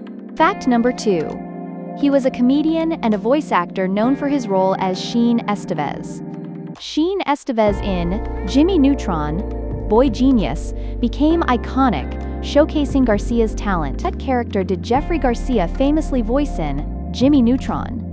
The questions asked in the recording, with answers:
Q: What character did Jeffrey Garcia famously voice in Jimmy Neutron?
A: Correct answer, Sheen Estevez.